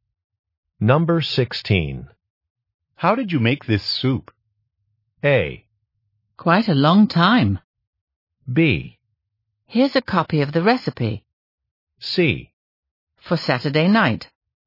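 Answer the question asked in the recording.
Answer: B: Here's a copy of the recipe.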